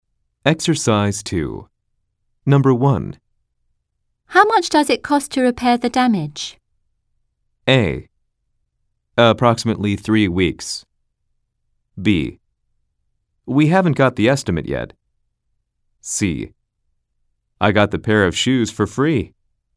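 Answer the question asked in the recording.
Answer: B: We haven't got the estimate yet.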